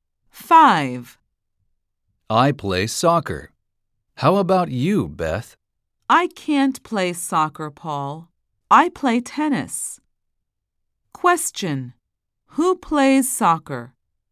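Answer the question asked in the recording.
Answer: Paul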